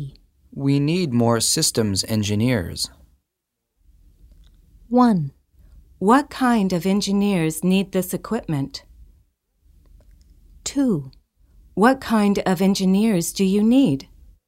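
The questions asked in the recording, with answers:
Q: We need more systems engineers.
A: 2: What kind of engineers do you need?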